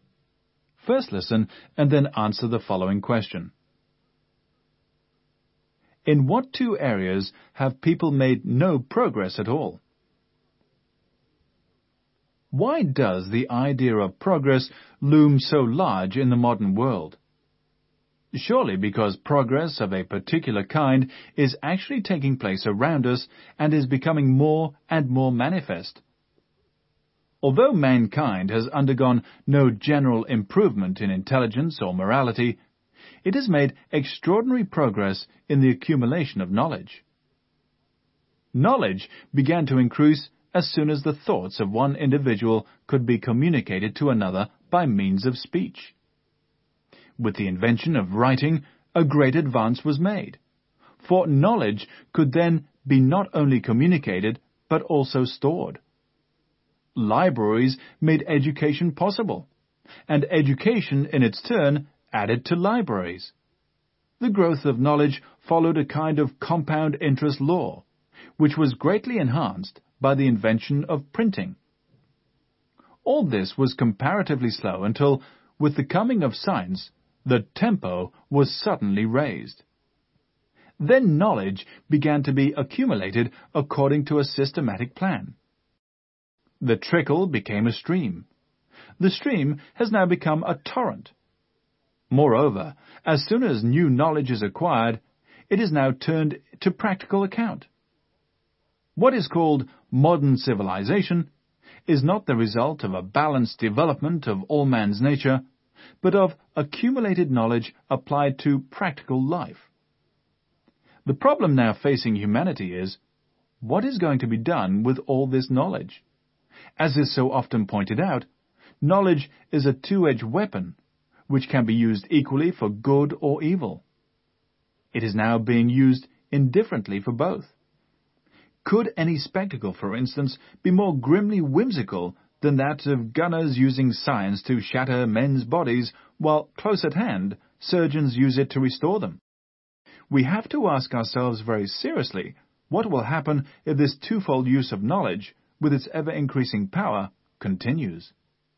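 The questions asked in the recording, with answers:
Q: In what two areas have people made no progress at all?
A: Intelligence and morality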